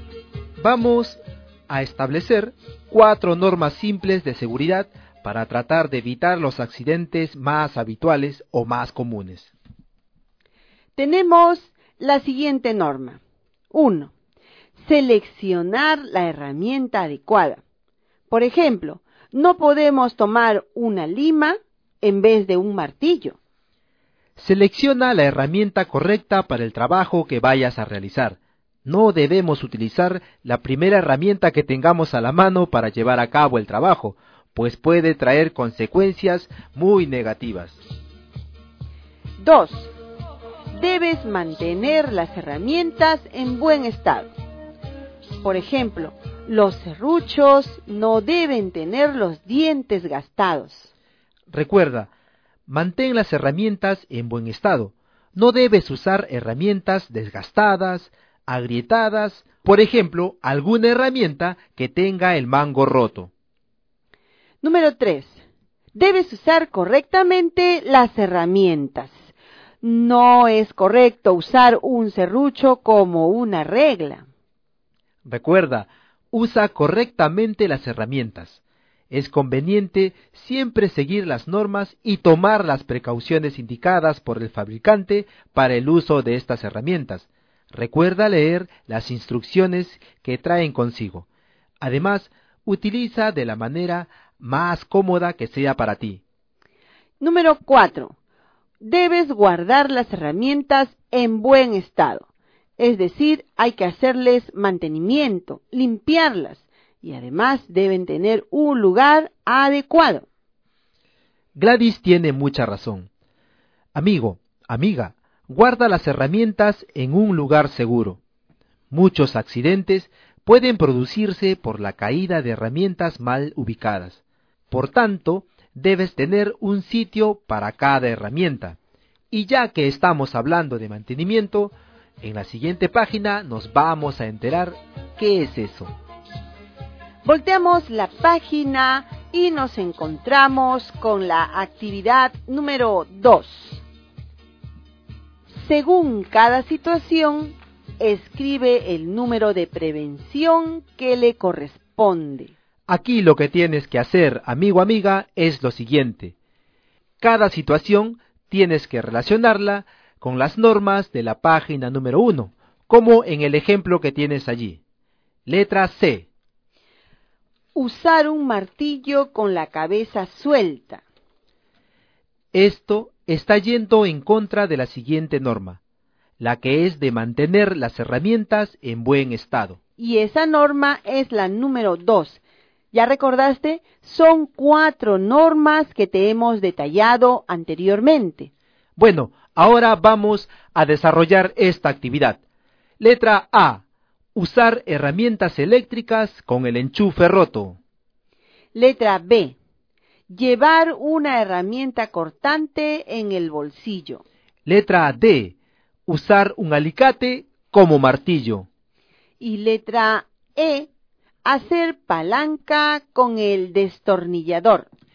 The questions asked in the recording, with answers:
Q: Letra A. Usar herramientas eléctricas con el enchufe roto.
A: La norma número 2.

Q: Letra B. Llevar una herramienta cortante en el bolsillo.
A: De la norma número 4.